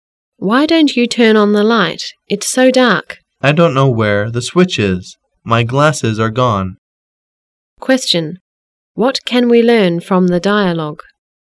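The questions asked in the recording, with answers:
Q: What can we learn from the dialogue?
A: The man can't find the light switch because his glasses are gone.

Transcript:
[解析] W: Why don't you turn on the light. It's so dark. M: I don't know where the switch is. My glasses are gone. Q: What can we learn from the dialogue?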